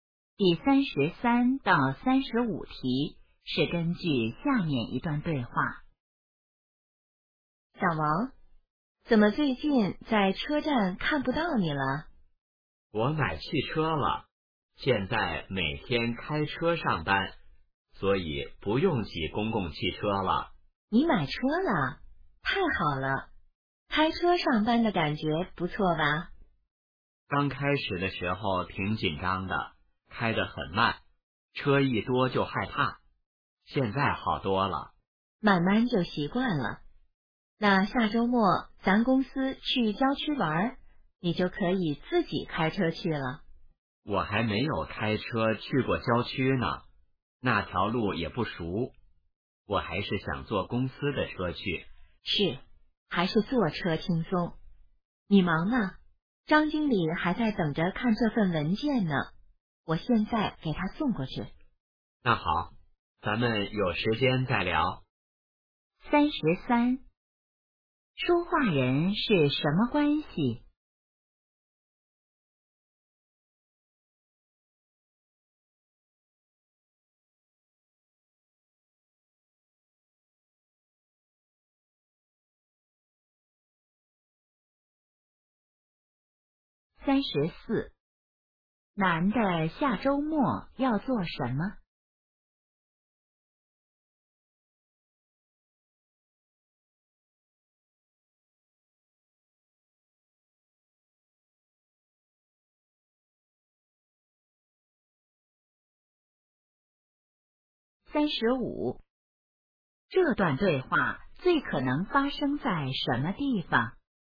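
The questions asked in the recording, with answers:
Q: 说话人是什么关系?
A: 同事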